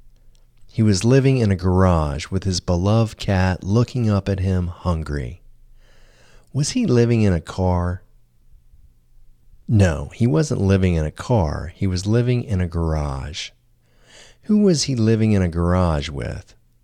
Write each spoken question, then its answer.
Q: Who was he living in a garage with?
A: He was living in a garage with his beloved cat.